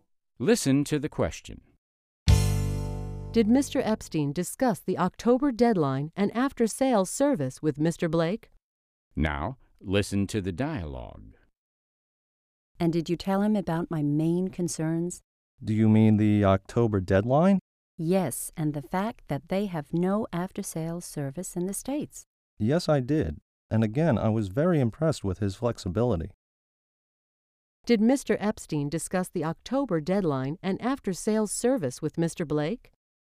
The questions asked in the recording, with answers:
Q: Did Mr. Epstein discuss the October deadline and after-sales service with Mr. Blake?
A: Yes, he did. He discussed these issues with Mr. Blake.